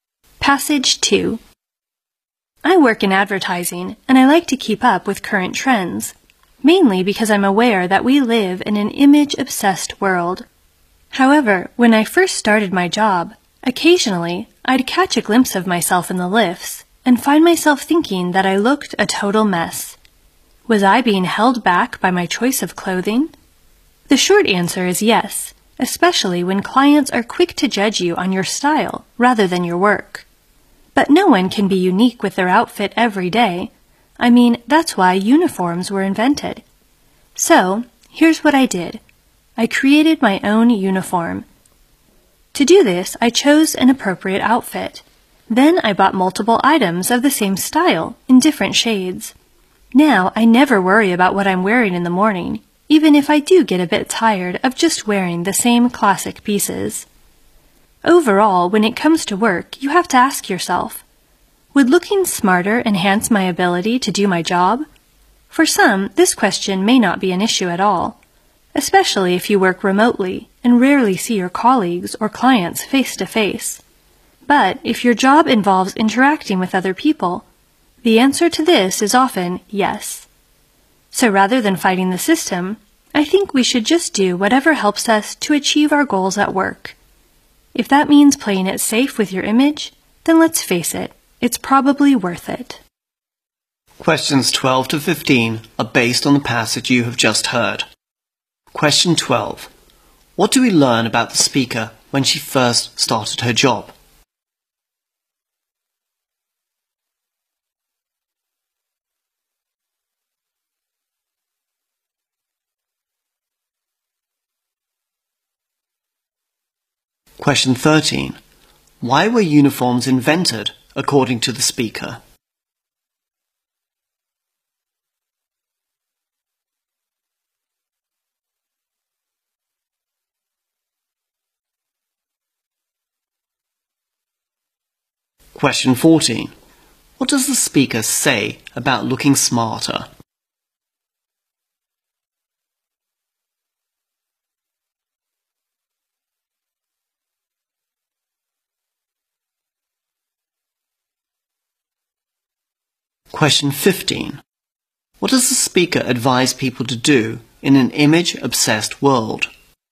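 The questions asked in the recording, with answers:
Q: What do we learn about the speaker when she first started her job?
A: She sometimes thought she looked a total mess.

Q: Why were uniforms invented, according to the speaker?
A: Because no one can have a unique outfit every day.

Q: What does the speaker say about looking smarter?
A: It often helps if your job involves dealing with other people.

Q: What does the speaker advise people to do in an image-obsessed world?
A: Do whatever helps them reach their work goals, including playing it safe with their image.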